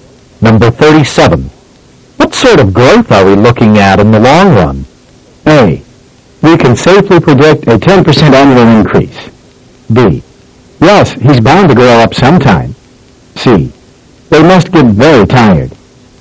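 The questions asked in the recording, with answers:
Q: What sort of growth are we looking at in the long run?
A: A: We can safely predict a 10% annual increase.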